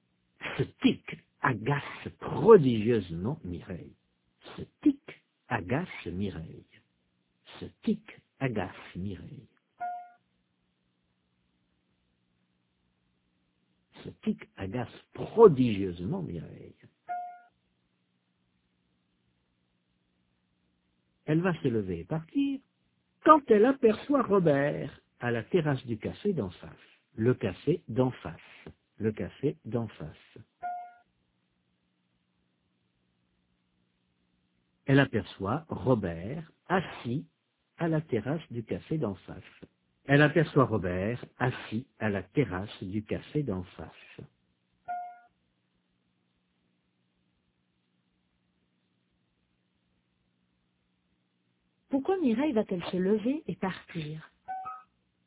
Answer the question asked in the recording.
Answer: Parce que ce tic l'agace.